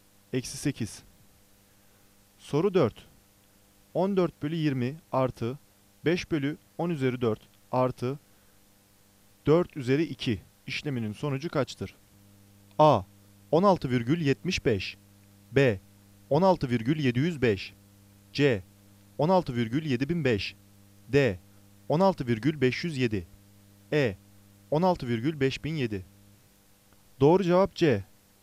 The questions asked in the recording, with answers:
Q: 14 bölü 20 artı 5 bölü 10 üzeri 4 artı 4 üzeri 2 işleminin sonucu kaçtır?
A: Doğru cevap C. 16,7005.